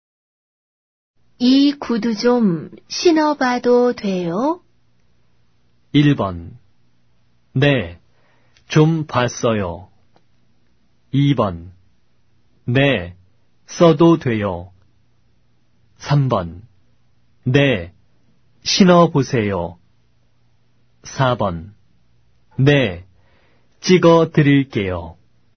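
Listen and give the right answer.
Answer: 3: 네, 신어보세요.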